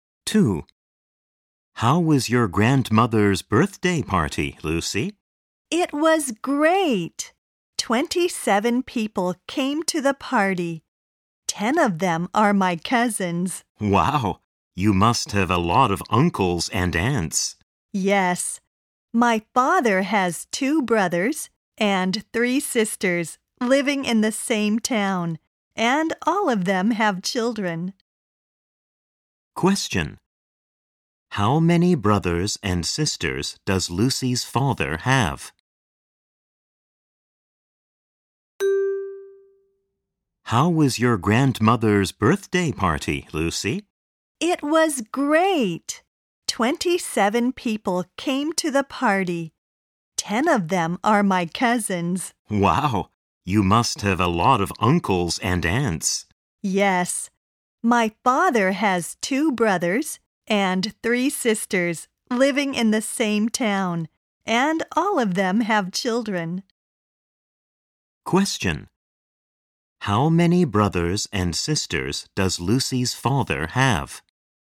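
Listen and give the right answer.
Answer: Five (2 brothers and 3 sisters)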